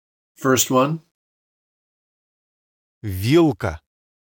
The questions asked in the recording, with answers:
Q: Вилка.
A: Second one.